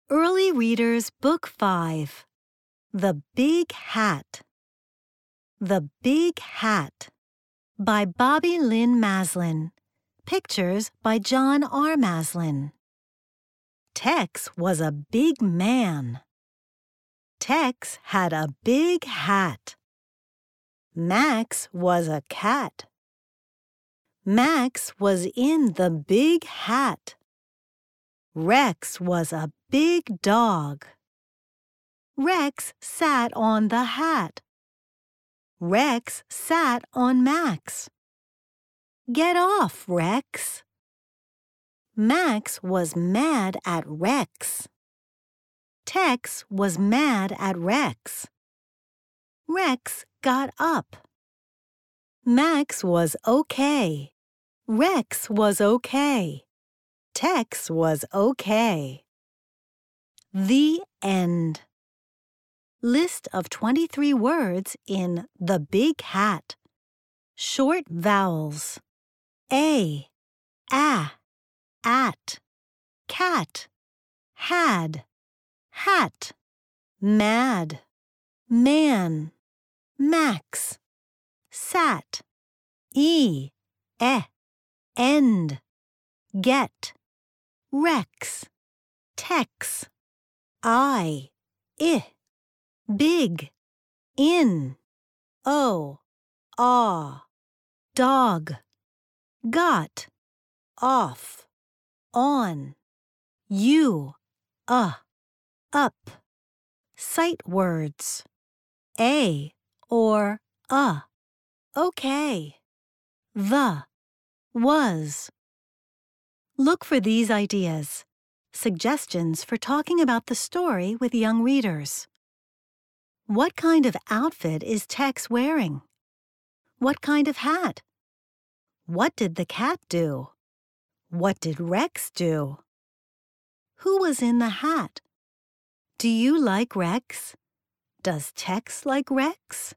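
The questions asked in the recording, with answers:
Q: What did Rex do?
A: He sat on the hat and on Max

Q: Who was in the hat?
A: Max the cat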